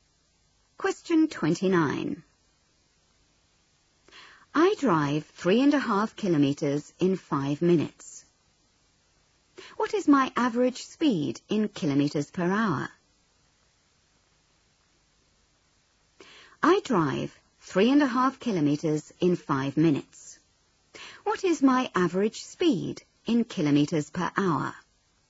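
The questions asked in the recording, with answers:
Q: What is my average speed in kilometres per hour?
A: 42 km/h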